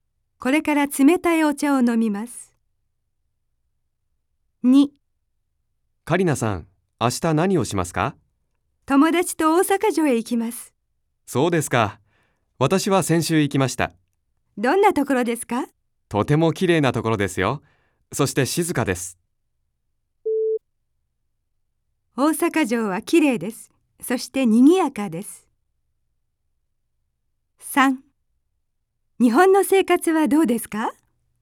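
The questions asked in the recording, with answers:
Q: 大阪城はきれいです。そしてにぎやかです。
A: ×(静かです)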